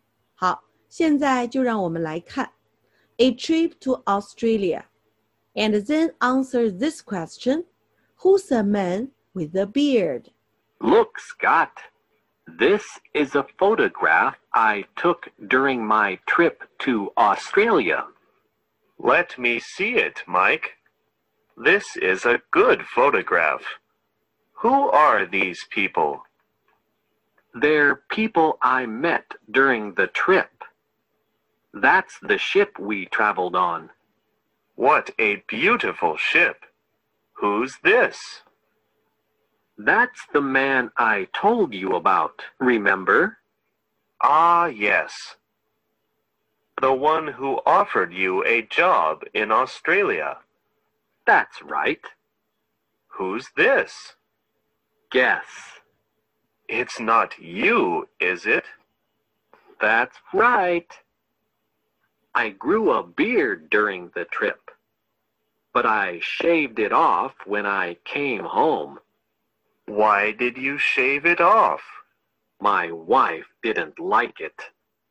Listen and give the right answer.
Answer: Yes, it's Mike.